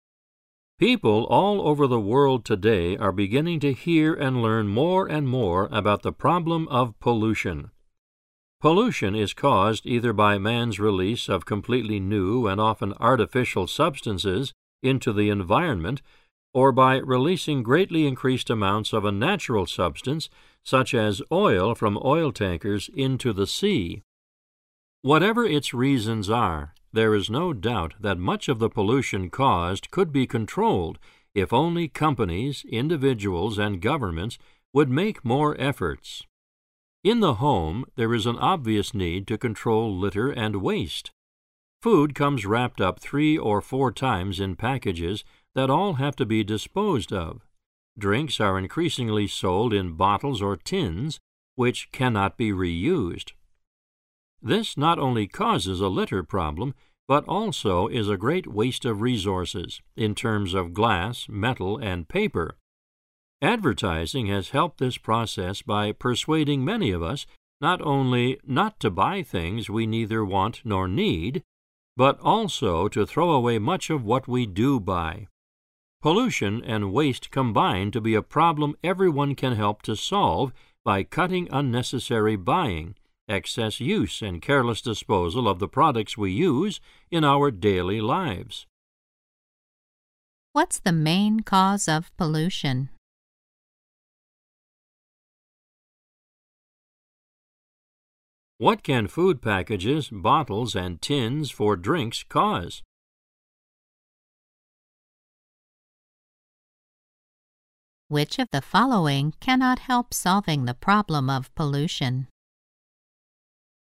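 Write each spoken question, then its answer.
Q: What's the main cause of pollution?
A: Man's release of new, often artificial substances, or of greatly increased amounts of natural substances, into the environment

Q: What can food packages, bottles, and tins for drinks cause?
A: A litter problem and a great waste of resources

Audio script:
[听力原文] People all over the world today are beginning to hear and learn more and more about the problem of pollution. Pollution is caused either by man's release of completely new and often artificial substances into the environment or by releasing greatly increased amounts of a natural substance, such as oil from oil tankers into the sea. Whatever its reasons are, there is no doubt that much of the pollution caused could be controlled if only companies, individuals and governments would make more efforts. In the home, there is an obvious need to control litter and waste. 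Food comes wrapped up three or four times in packages that all have to be disposed of; drinks are increasingly sold in bottles or tins which cannot be reused. This not only causes a litter problem, but also is a great waste of resources, in terms of glass, metal and paper. Advertising has helped this process by persuading many of us not only not to buy things we neither want nor need, but also to throw away much of what we do buy. Pollution and waste combine to be a problem everyone can help to solve by cutting unnecessary buying, excess use and careless disposal of the products we use in our daily lives.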